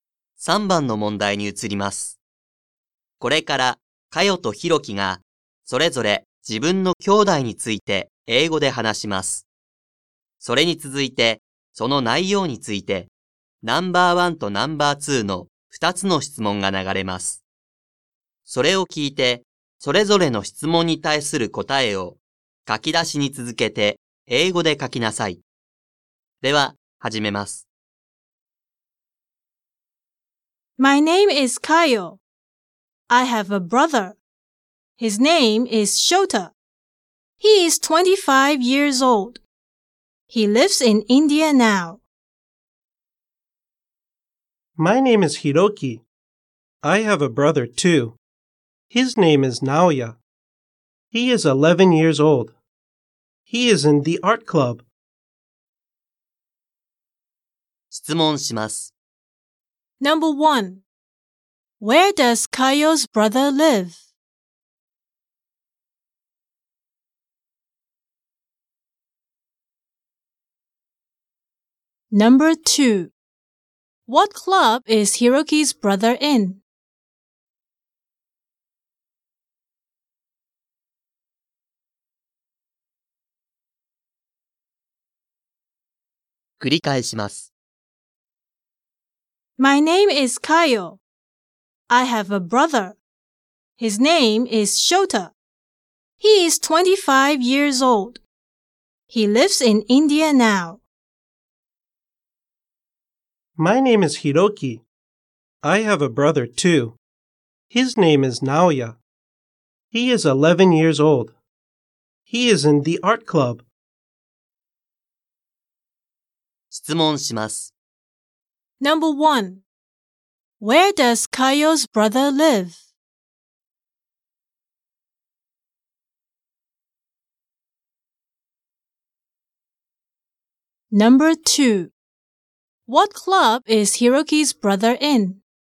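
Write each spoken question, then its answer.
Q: Where does Kayo's brother live?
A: He lives in India.

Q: What club is Hiroki's brother in?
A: He is in the art club.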